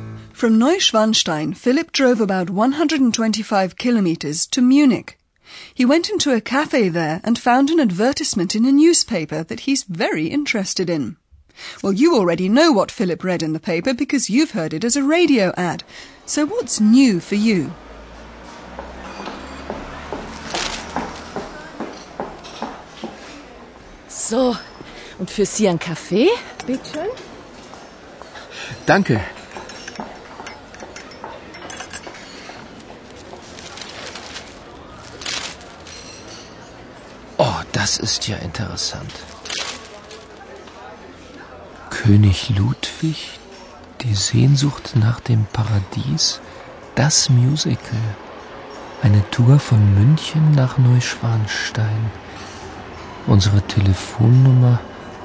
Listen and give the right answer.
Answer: What's new to you is that a tour is offered from Munich to Neuschwanstein Castle.